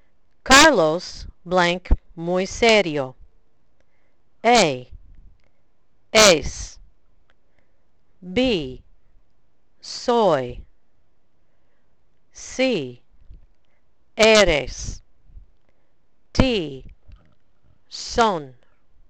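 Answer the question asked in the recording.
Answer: A: Es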